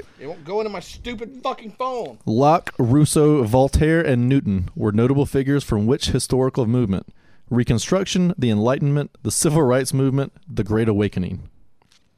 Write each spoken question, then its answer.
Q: Locke, Rousseau, Voltaire, and Newton were notable figures from which historical movement?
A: It is the Enlightenment.